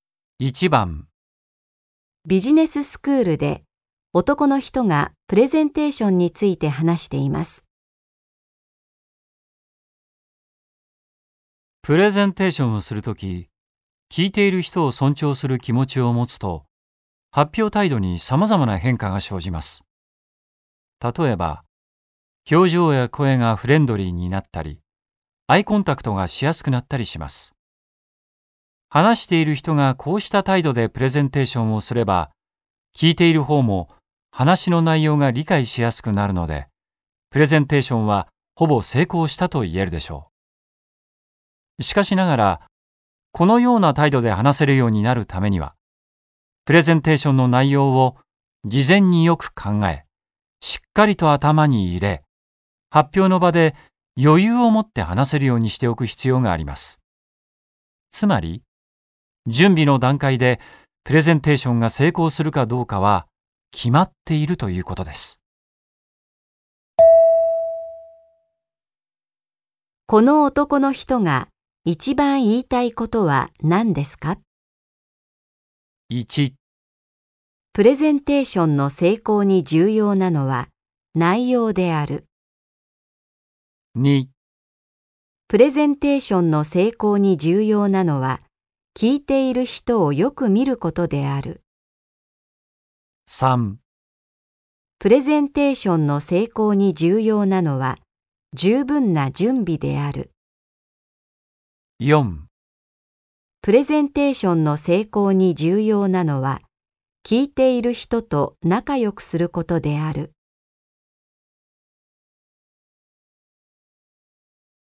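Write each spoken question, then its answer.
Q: この男の人が一番言いたいことは何ですか?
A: 3: プレゼンテーションの成功に重要なのは、十分な準備である。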